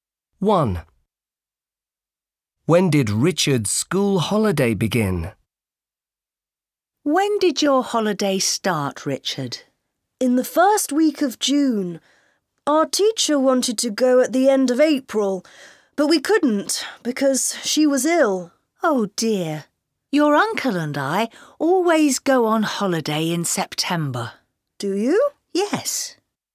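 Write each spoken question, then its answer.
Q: When did Richard's school holiday begin?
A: In the first week of June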